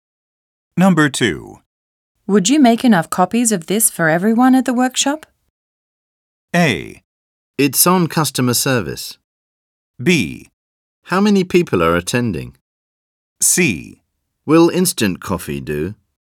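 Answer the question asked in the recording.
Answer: B: How many people are attending?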